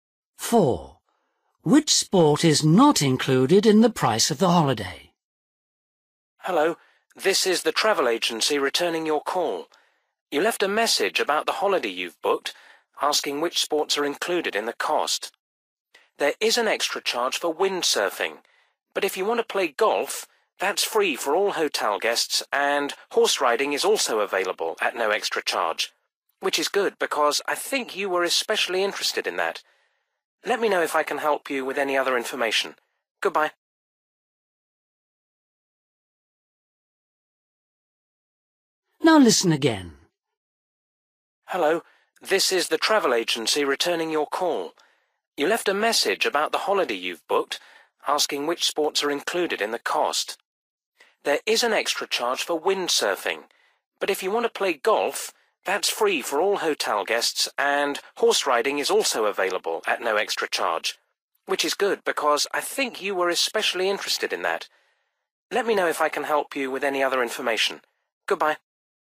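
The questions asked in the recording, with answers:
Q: Which sport is not included in the price of the holiday?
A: Windsurfing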